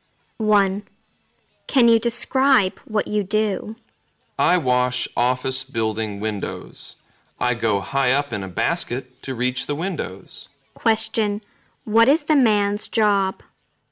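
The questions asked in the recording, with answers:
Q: Question, what is the man's job?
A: He washes office building windows (window cleaner).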